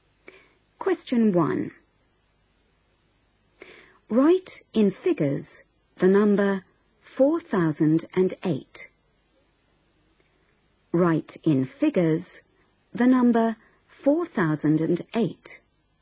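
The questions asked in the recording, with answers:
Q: Write in figures the number 4008.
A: 4008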